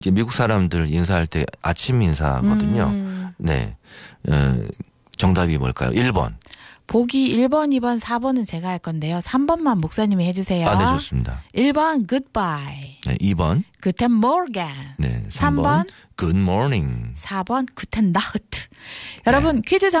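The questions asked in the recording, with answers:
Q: 미국 사람들 인사할 때 아침 인사거든요. 네. 정답이 뭘까요?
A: 3: Good morning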